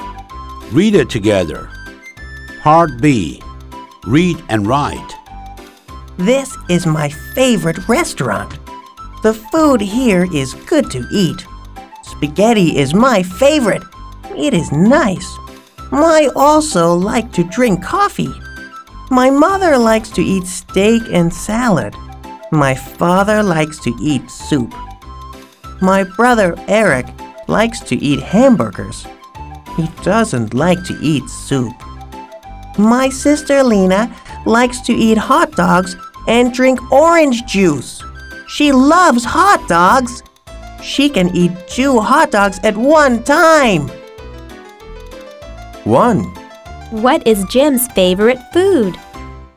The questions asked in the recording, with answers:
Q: What is Jim's favorite food?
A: His favorite food is spaghetti.